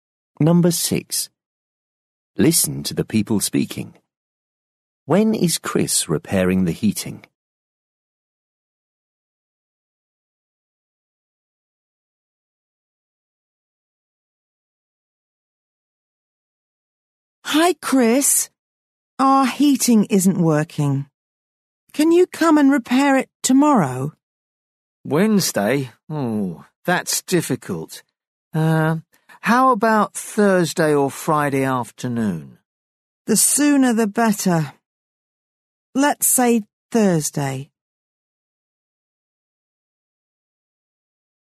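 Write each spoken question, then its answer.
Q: When is Chris repairing the heating?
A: Thursday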